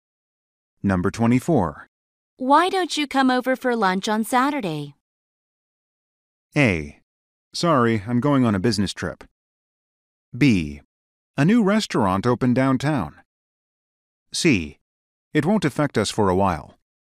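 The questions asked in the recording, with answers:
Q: Why don't you come over for lunch on Saturday?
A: A: Sorry, I'm going on a business trip.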